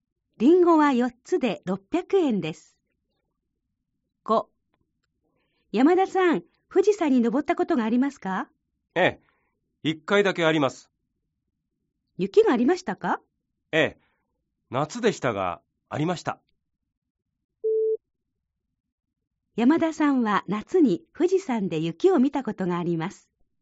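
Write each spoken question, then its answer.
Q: 山田さんは夏に富士山で雪を見たことがあります。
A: 正しい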